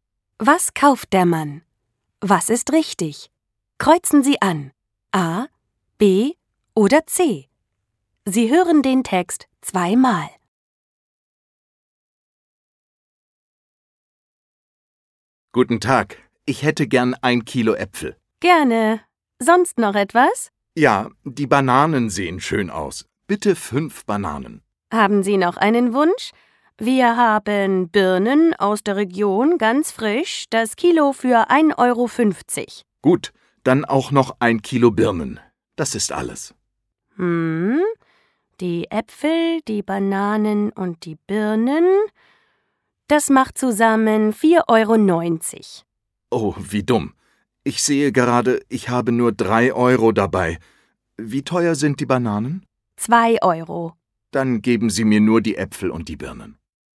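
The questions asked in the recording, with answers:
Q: Was kauft der Mann?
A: Äpfel und Birnen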